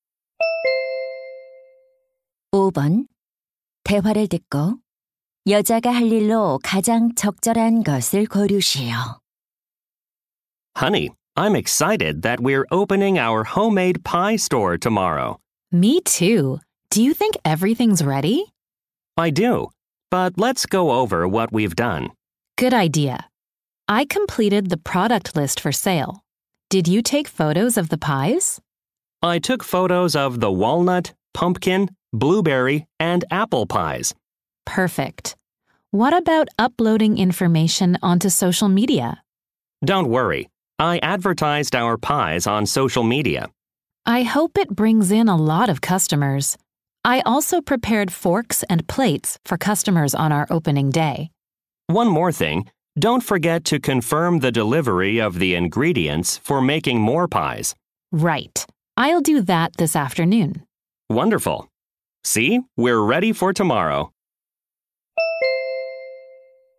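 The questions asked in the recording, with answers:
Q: 대화를 듣고 여자가 할 일로 가장 적절한 것을 고르시오.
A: 재료 배송 확인하기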